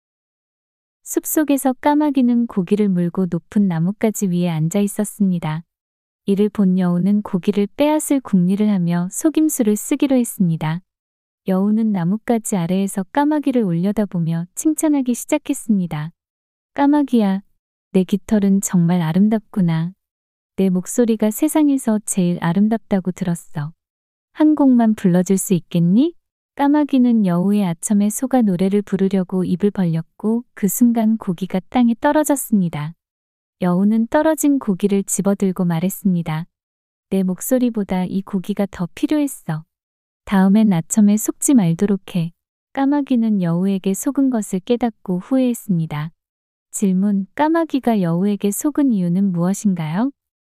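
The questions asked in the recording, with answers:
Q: 까마귀가 여우에게 속은 이유는 무엇인가요?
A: 여우의 아첨(칭찬)에 속아 노래를 부르려고 입을 벌렸기 때문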